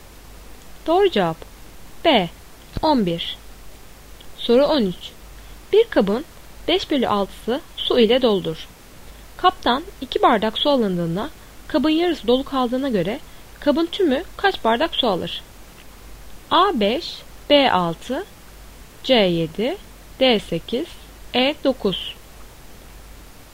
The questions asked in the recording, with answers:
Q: Kaptan 2 bardak su alındığında kabın yarısı dolu kaldığına göre kabın tümü kaç bardak su alır?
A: Doğru cevap B 6.